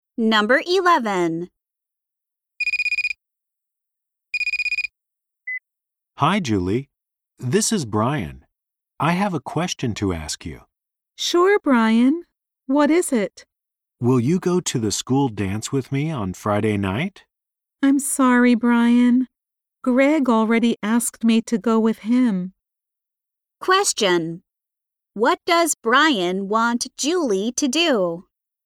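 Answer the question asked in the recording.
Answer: Go to the school dance with him on Friday night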